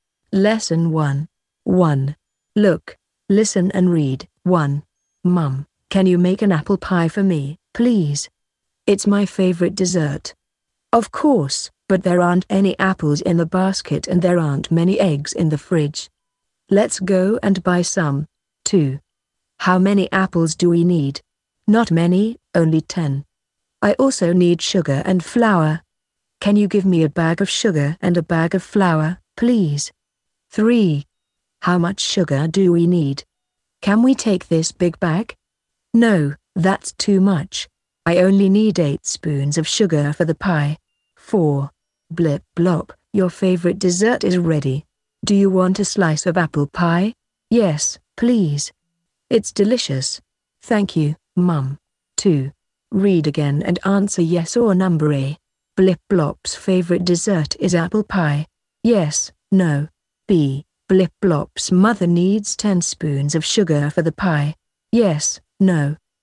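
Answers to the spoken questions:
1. Yes
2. No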